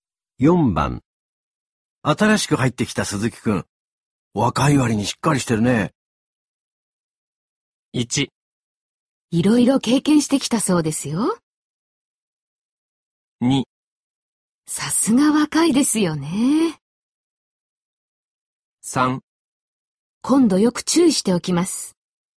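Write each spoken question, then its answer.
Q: 新しく入ってきた鈴木くん。若い割にしっかりしてるね。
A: 1: いろいろ経験してきたそうですよ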